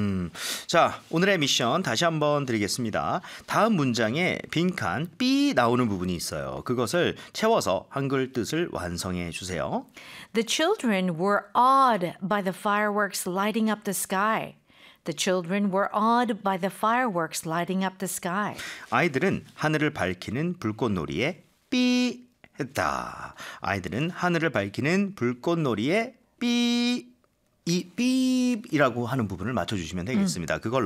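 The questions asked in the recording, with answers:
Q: 아이들은 하늘을 밝히는 불꽃놀이에 B 했다.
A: 경탄(감탄)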